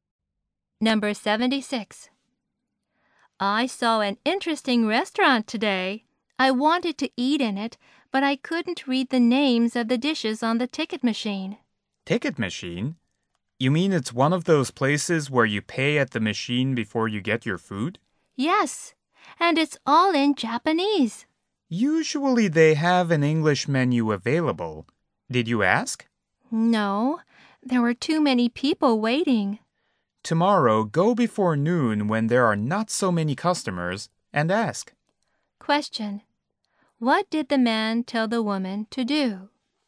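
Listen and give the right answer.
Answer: Go before noon and ask for an English menu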